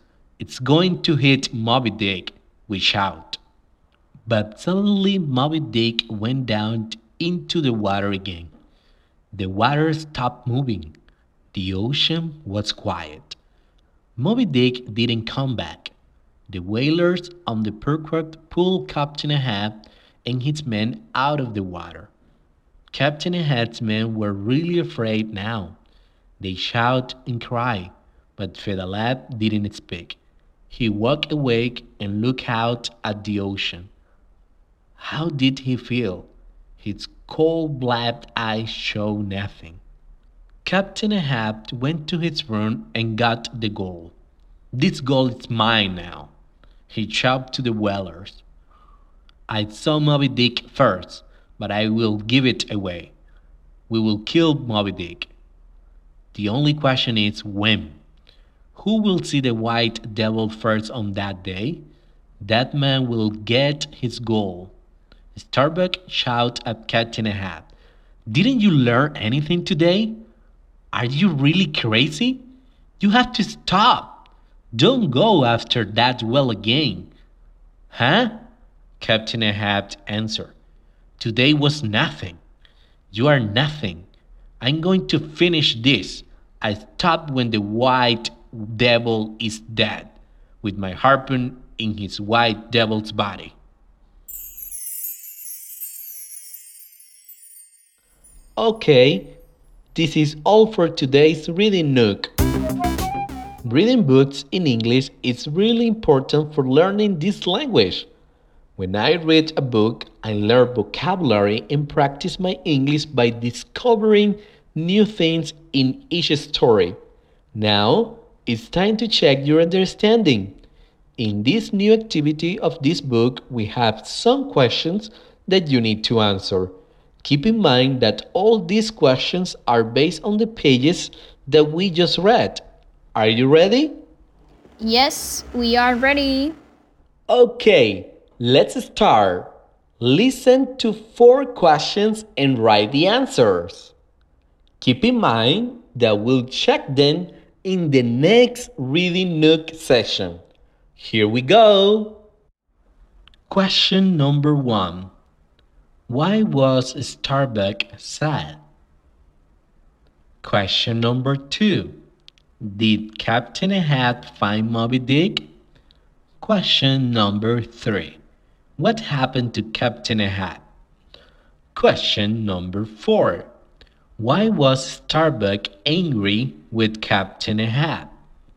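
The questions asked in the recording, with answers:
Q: Did Captain Ahab find Moby Dick?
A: Yes, he saw Moby Dick first.

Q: Why was Starbuck angry with Captain Ahab?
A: Because Ahab wanted to go after the whale again.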